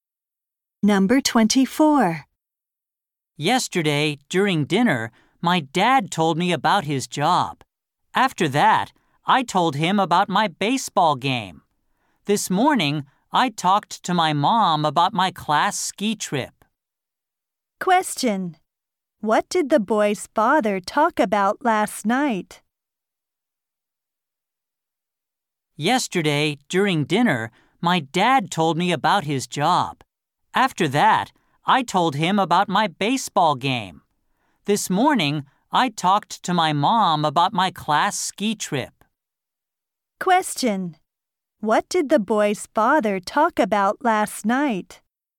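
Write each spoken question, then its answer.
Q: What did the boy's father talk about last night?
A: His job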